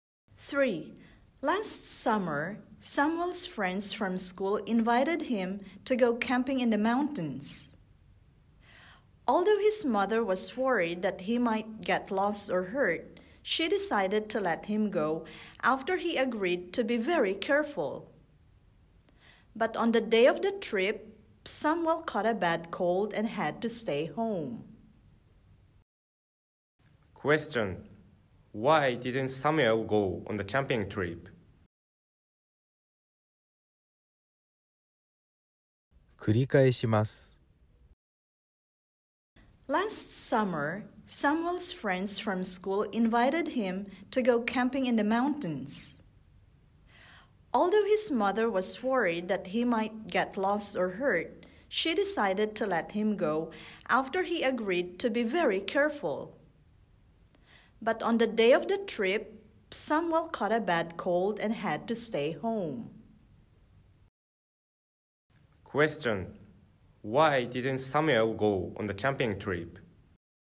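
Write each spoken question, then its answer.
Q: Question: Why didn't Samuel go on the camping trip?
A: He caught a bad cold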